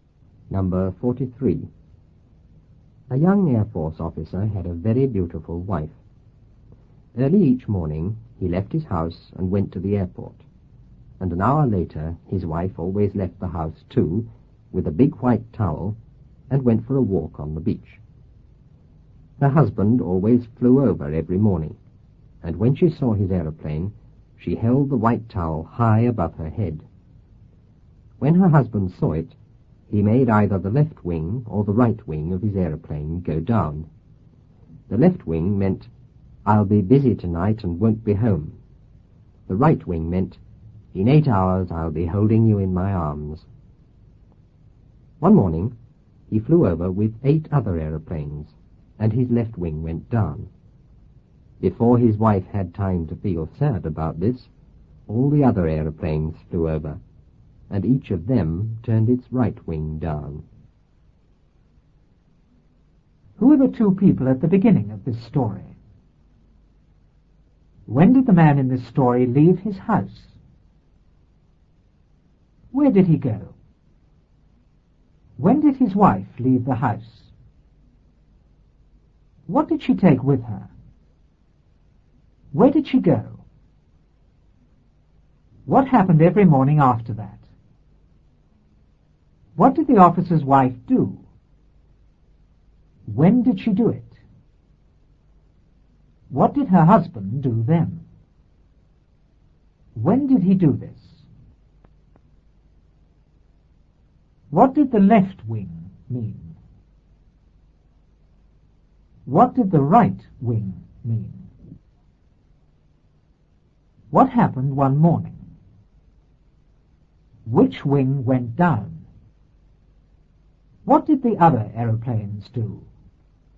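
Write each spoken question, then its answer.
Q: Who are the two people at the beginning of this story?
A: A young Air Force officer and his beautiful wife

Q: When did the man in this story leave his house?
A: Early each morning

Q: Where did he go?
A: To the airport

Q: When did his wife leave the house?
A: An hour later

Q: What did she take with her?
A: A big white towel

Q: Where did she go?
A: For a walk on the beach

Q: What happened every morning after that?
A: Her husband flew over

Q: What did the officer's wife do?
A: She held the white towel high above her head

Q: When did she do it?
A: When she saw his aeroplane

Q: What did her husband do then?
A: He made the left or right wing of his aeroplane go down

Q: When did he do this?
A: When he saw the towel

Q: What did the left wing mean?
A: I'll be busy tonight and won't be home

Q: What did the right wing mean?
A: In 8 hours I'll be holding you in my arms

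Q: What happened one morning?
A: He flew over with 8 other aeroplanes

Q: Which wing went down?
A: His left wing

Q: What did the other aeroplanes do?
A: Each turned its right wing down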